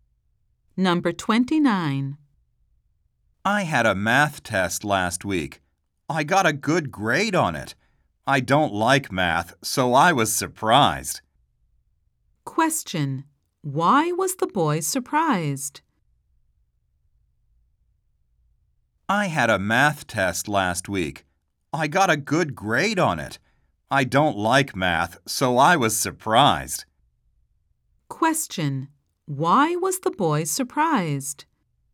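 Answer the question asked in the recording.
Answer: He got a good grade on his math test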